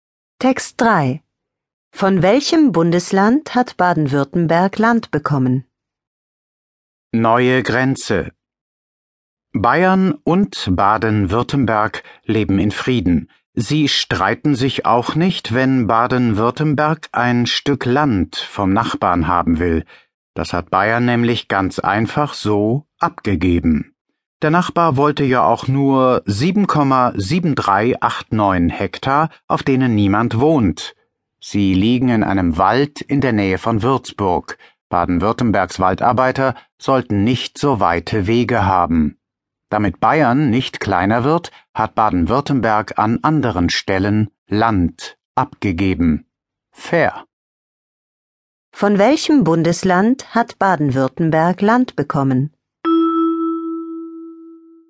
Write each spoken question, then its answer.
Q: Von welchem Bundesland hat Baden-Württemberg Land bekommen?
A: Es hat Land von Bayern bekommen.